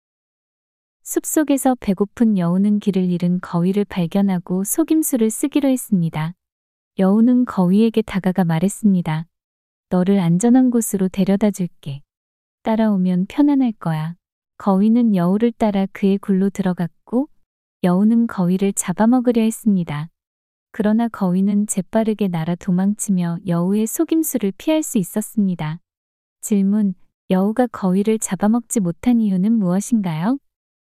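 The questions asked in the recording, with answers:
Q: 여우가 거위를 잡아먹지 못한 이유는 무엇인가요?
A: 거위가 재빠르게 날아 도망쳤기 때문입니다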